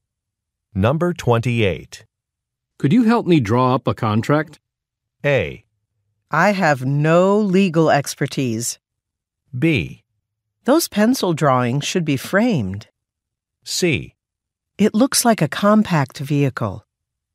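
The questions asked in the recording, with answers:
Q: Could you help me draw up a contract?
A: A: I have no legal expertise.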